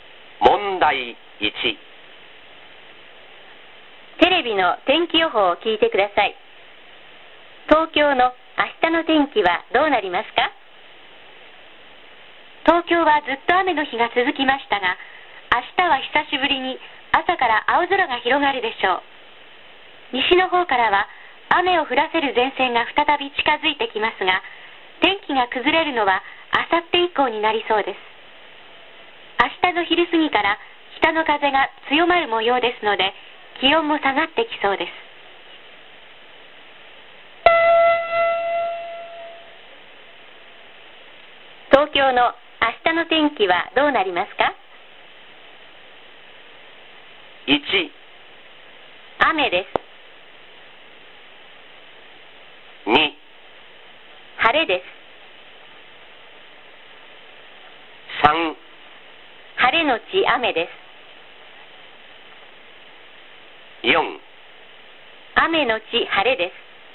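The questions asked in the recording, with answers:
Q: 東京の明日の天気はどうなりますか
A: 2: 晴れです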